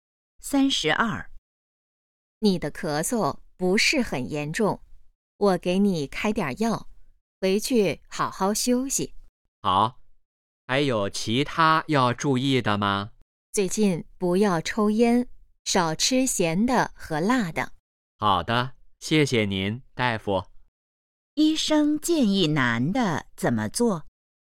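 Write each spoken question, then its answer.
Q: 医生建议男的怎么做?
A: 不要抽烟,少吃咸的和辣的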